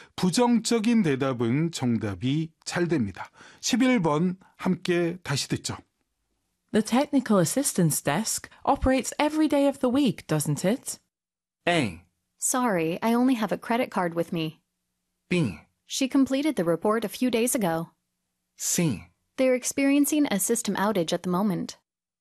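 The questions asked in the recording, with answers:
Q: The technical assistance desk operates every day of the week, doesn't it?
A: C: They're experiencing a system outage at the moment.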